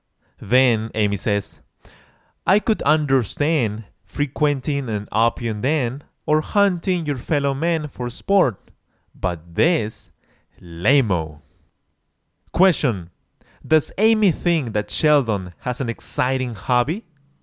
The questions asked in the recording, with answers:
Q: Does Amy think that Sheldon has an exciting hobby?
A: No, of course not.